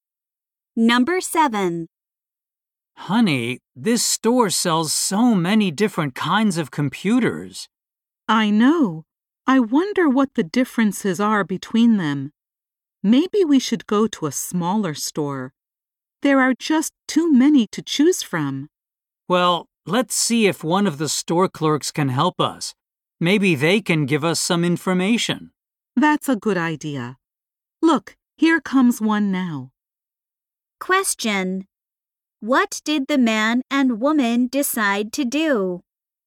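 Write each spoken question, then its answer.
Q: What did the man and woman decide to do?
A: Ask a store clerk for help.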